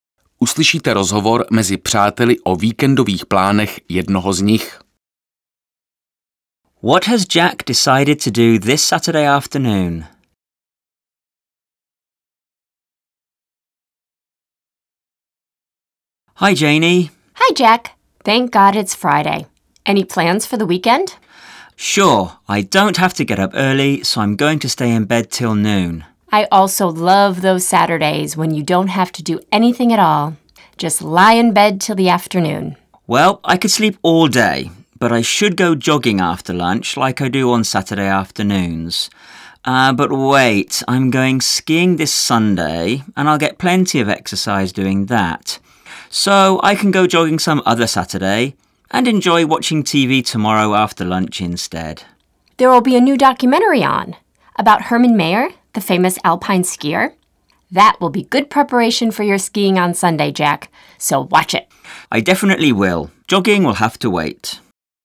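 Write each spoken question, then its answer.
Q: What has Jack decided to do this Saturday afternoon?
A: Watch TV (a documentary about Hermann Mayer)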